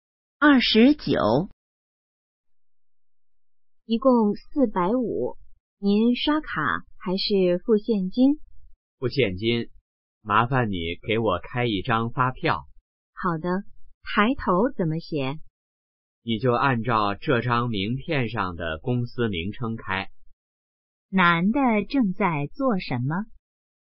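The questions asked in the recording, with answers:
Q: 男的正在做什么?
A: 付款结账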